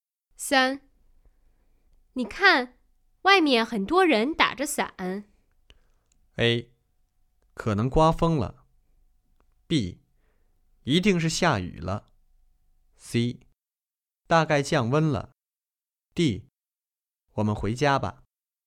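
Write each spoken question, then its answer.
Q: 你看,外面很多人打着伞。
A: B: 一定是下雨了。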